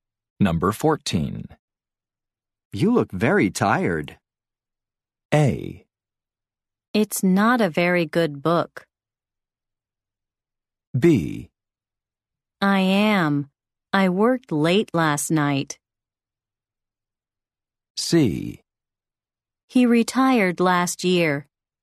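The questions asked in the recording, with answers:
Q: You look very tired.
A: B: I am. I worked late last night.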